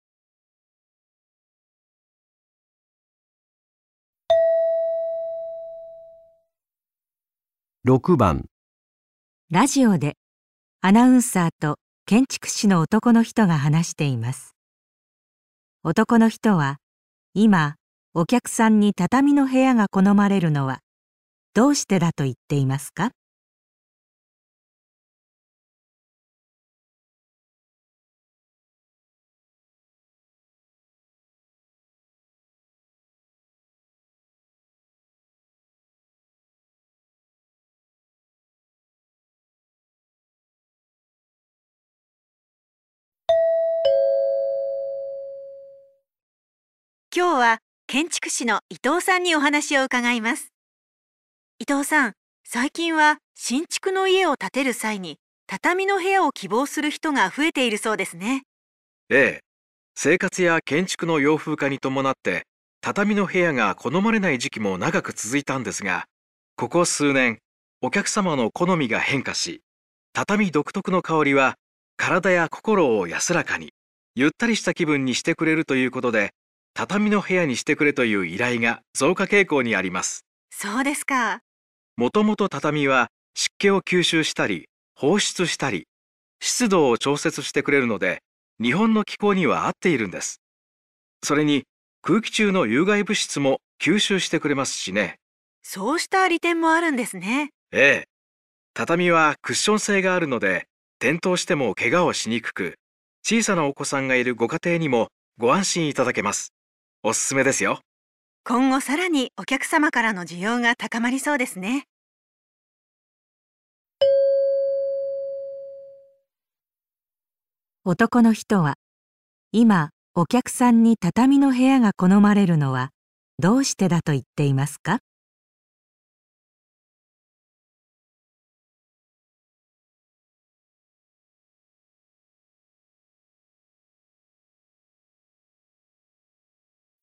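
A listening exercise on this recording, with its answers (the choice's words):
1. 男の人は今、 お客さんに畳の部屋が好まれるのは どうしてだと言っていますか?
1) たたみの香りでリラックスできること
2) たたみが部屋の湿度を調整すること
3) たたみが空気中の有害物質を吸収すること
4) 転んでもけがをしにくいこと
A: たたみの香りでリラックスできること

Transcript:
アナウンサー:今日は建築士の伊藤さんにお話を伺います。 伊藤さん、 最近は新築の家を建てる際に畳の部 屋を希望する人が増えているそうですね。
男の人 : ええ、生活や建築の洋風化に伴って、 畳の部屋が好まれない時期も長く続いたんですが、 ここ数年、 お客様の好みが変化し、 畳独特の香りが、 体や心を安らかに、 ゆったりした気分にしてくれるということで、畳 の部屋にしてくれという依頼が増加傾向にあります。
男の人 : もともと畳は湿気を吸収したり、放出したり、 湿度を調節してくれるので、日本の気候には合っている んです。 それに空気中の有害物質も吸収してくれますしね。
アナウンサー:そうした利点もあるんですね。
男の人 : ええ、畳はクッション性があるので転倒してもケガをしにくく、小さなお子さんがいるご家庭にもご安心 いただけます。おすすめですよ。
アナウンサー:今後さらにお客様からの需要が高まりそうですね。
質問: 男の人は今お客さんに畳の部屋が好まれるのはどうしてだと言っていますか?

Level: 【N1 第1回】聴解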